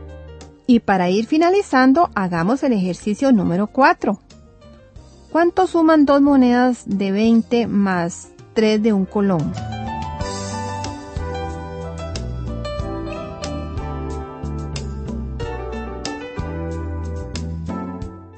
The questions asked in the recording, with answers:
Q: ¿Cuánto suman 2 monedas de 20 más 3 de 1 colón?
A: Indudablemente que el resultado es 43.